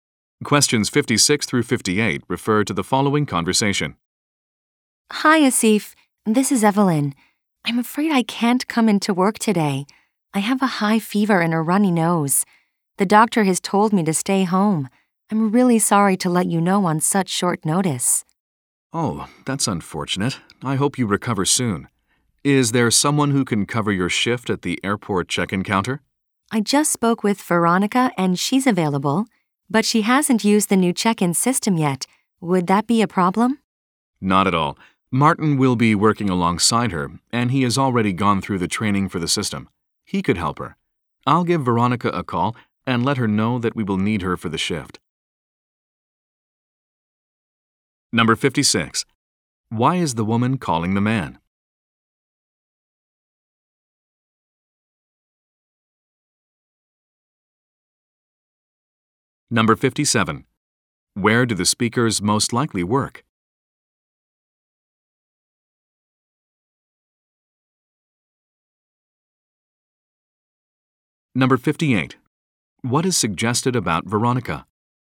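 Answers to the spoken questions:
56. She is sick and can't come to work
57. At an airport
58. She hasn't used the new check-in system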